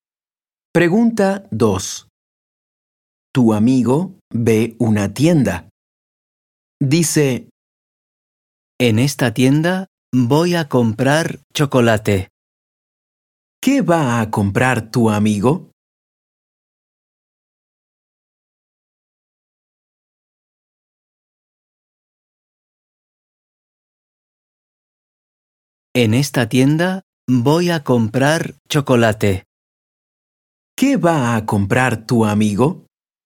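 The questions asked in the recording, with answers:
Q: ¿Qué va a comprar tu amigo?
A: Chocolate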